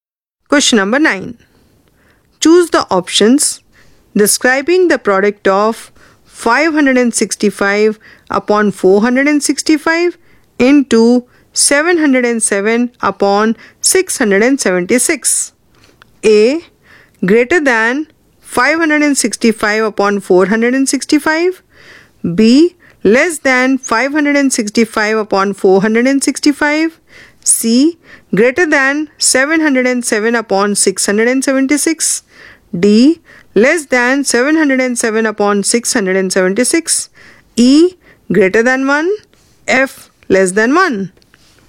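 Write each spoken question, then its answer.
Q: Choose the options describing the product of 565 upon 465 into 707 upon 676.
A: A: Greater than 565 upon 465; C: Greater than 707 upon 676; E: Greater than 1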